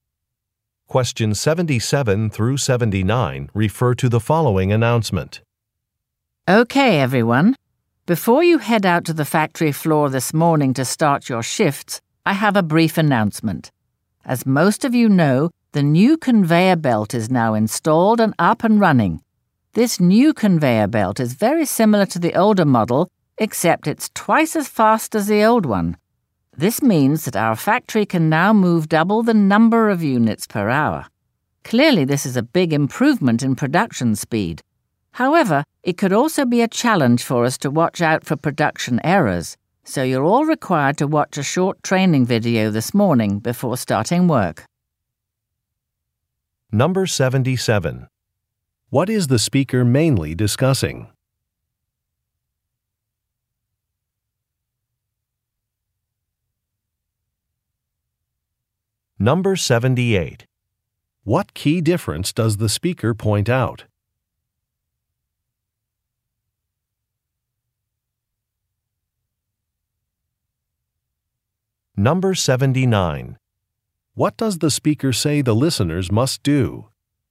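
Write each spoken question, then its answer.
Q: What is the speaker mainly discussing?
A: A new conveyor belt

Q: What key difference does the speaker point out?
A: It is twice as fast

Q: What does the speaker say the listeners must do?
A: Watch a training video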